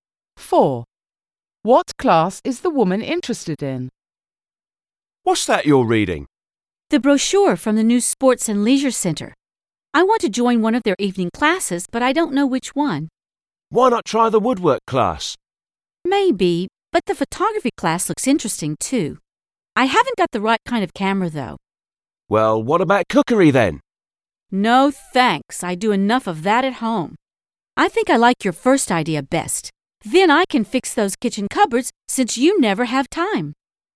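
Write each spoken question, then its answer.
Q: What class is the woman interested in?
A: woodwork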